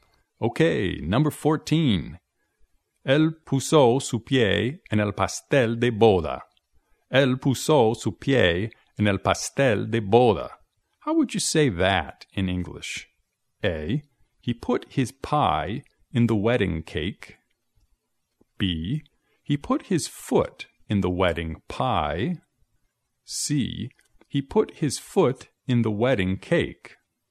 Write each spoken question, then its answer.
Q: How would you say that in English?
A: Así que la respuesta correcta es C.